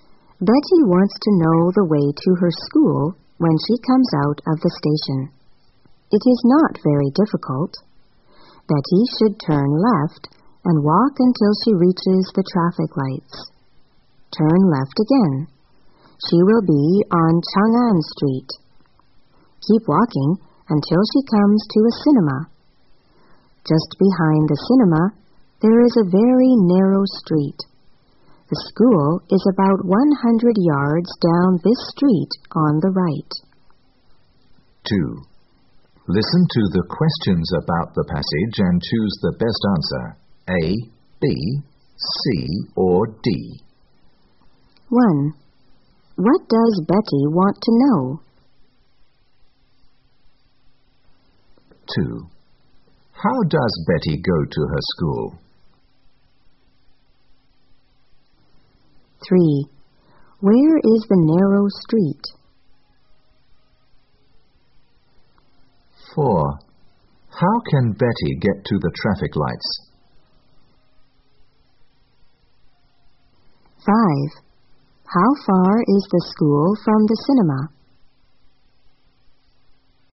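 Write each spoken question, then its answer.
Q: What does Betty want to know?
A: The way to her school

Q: How does Betty go to her school?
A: On foot (she walks)

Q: Where is the narrow street?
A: Just behind the cinema

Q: How can Betty get to the traffic lights?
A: Turn left out of the station and walk

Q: How far is the school from the cinema?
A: About 100 yards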